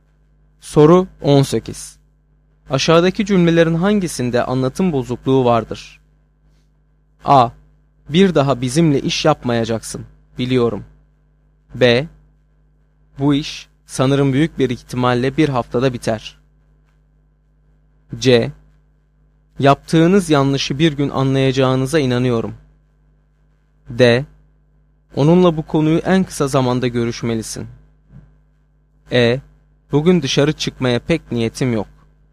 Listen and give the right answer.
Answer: Doğru cevap B şıkkı.